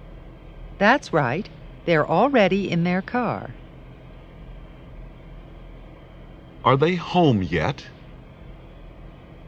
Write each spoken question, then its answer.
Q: Are they home yet?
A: No, they're not.